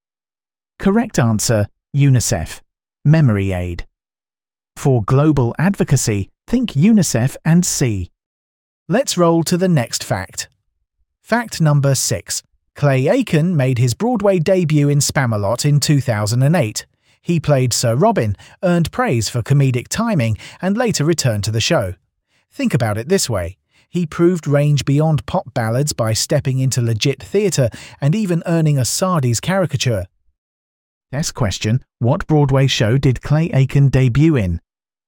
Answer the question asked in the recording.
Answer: Spamalot.